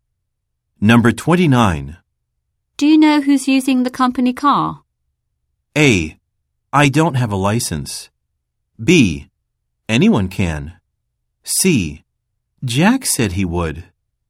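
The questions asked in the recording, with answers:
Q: Do you know who's using the company car?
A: C: Jack said he would.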